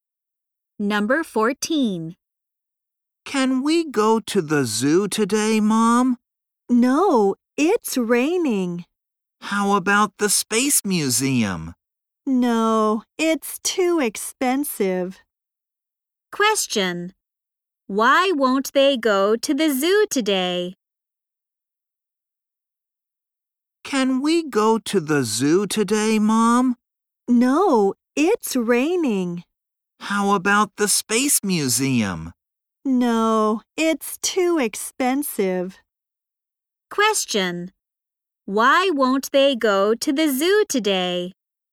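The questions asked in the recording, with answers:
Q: Why won't they go to the zoo today?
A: Because it's raining.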